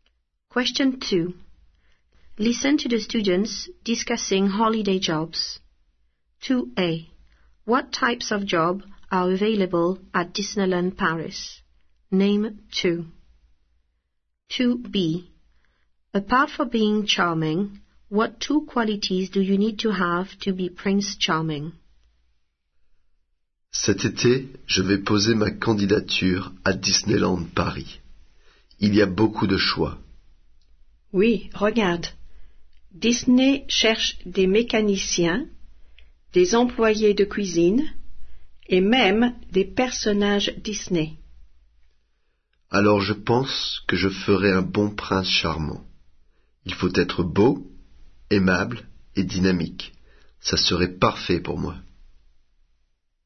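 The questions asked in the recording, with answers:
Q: What types of job are available at Disneyland Paris?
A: Mechanics, kitchen staff, Disney characters (any two)

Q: Apart from being charming, what two qualities do you need to have to be Prince Charming?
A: Good-looking and dynamic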